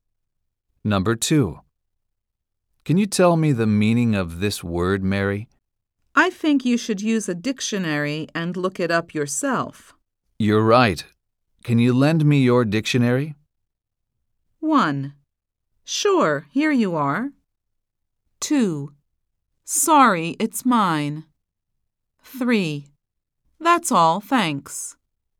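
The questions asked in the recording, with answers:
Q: Can you lend me your dictionary?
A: 1: Sure, here you are.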